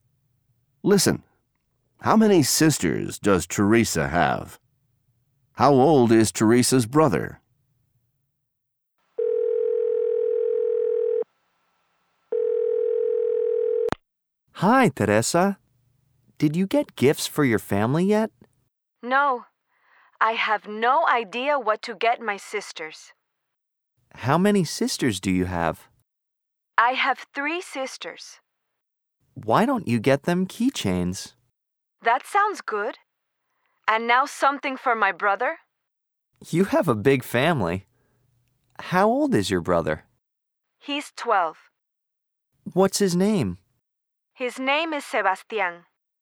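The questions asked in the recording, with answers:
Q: How many sisters does Teresa have?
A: Three

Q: How old is Teresa's brother?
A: 12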